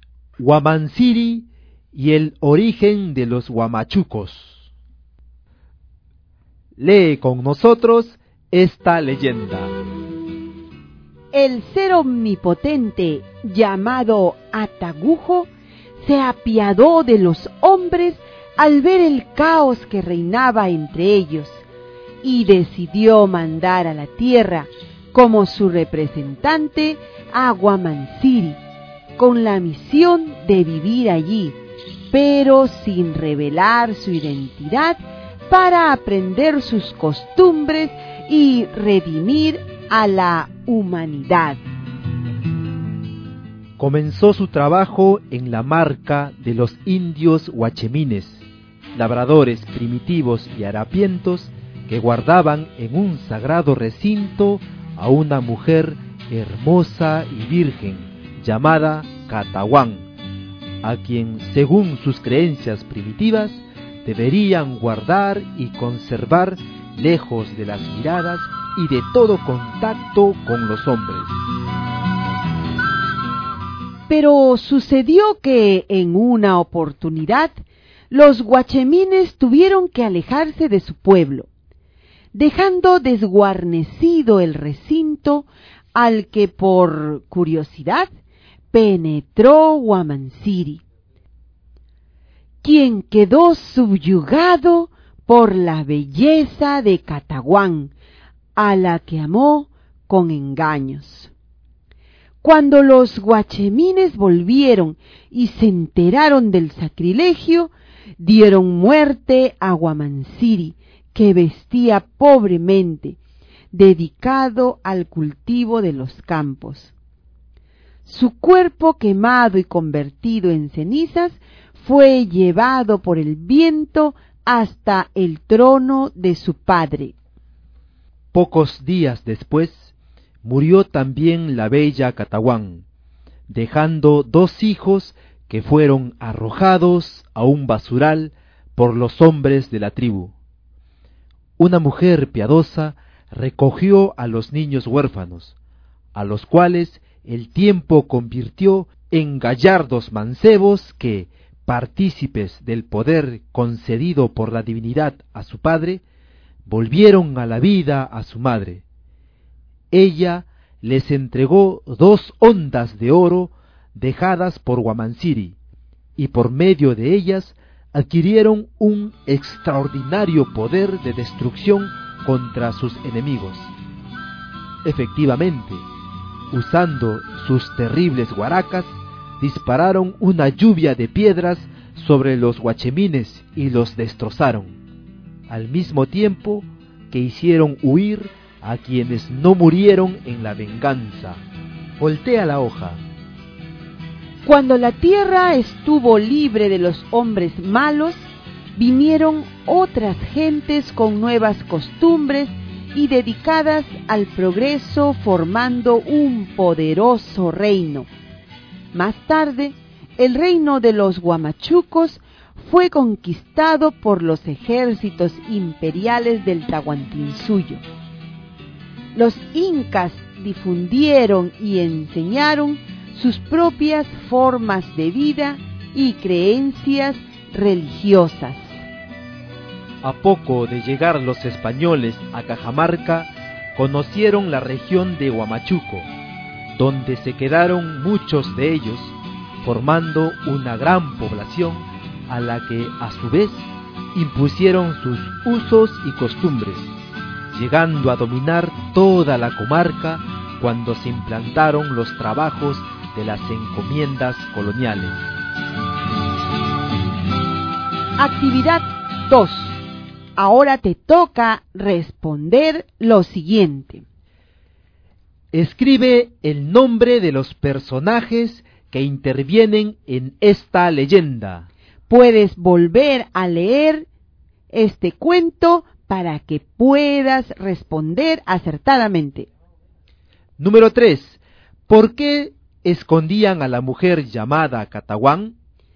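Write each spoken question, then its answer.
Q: ¿Por qué escondían a la mujer llamada Catahuán?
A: Porque según sus creencias debían guardarla lejos de las miradas y del contacto con los hombres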